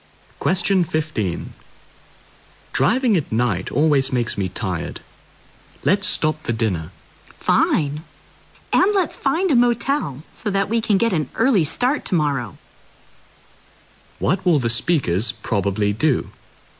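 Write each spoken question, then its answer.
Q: What will the speakers probably do?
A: Stop for dinner and stay at a motel for the night.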